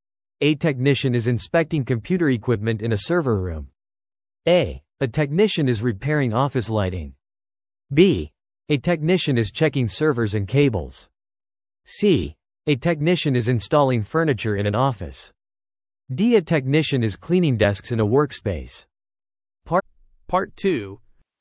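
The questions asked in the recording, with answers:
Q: A technician is inspecting computer equipment in a server room.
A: B: A technician is checking servers and cables.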